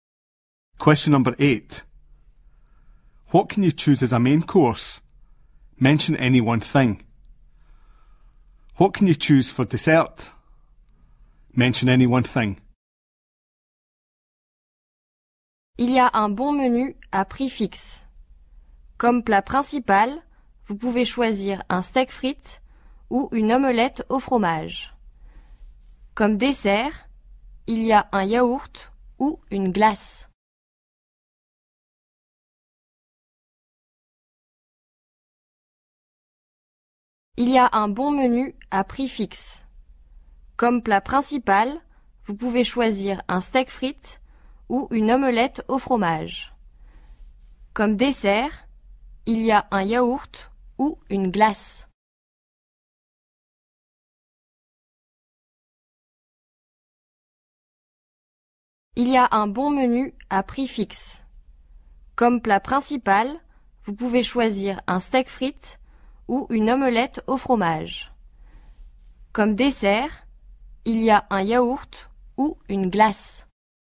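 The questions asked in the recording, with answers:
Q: What can you choose as a main course?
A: Steak and chips or cheese omelette

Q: What can you choose for dessert?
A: Yoghurt or ice cream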